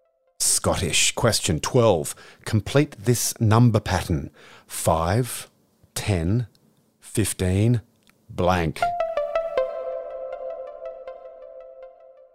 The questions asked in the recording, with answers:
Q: Complete this number pattern.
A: 20. 5, 10, 15, 20.